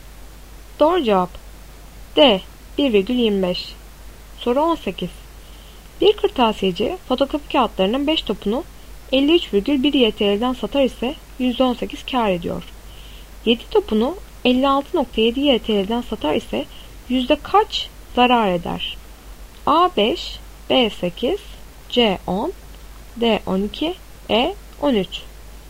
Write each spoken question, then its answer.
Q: 7 topunu 56,7 YTL'den satar ise yüzde kaç zarar eder?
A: Doğru cevap C 10.